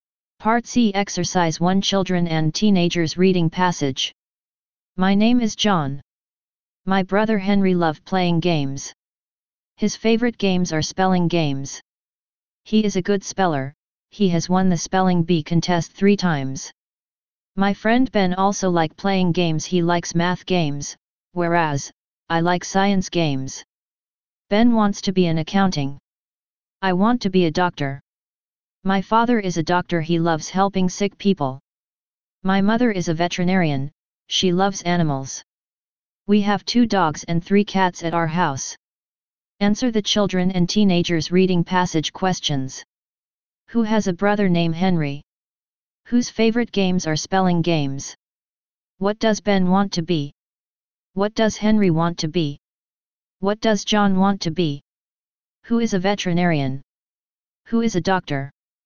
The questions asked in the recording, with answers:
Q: Who has a brother named Henry?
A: 1 John.

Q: Whose favorite games are spelling games?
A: 2 Henry.

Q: What does Ben want to be?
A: 3 An Accountant.